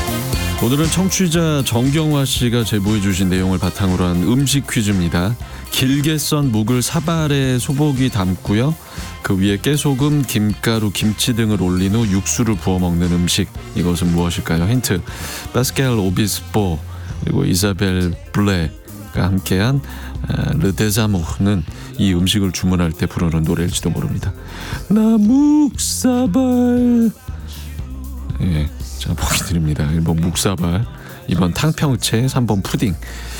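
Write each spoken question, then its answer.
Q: 이것은 무엇일까요?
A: 1: 묵사발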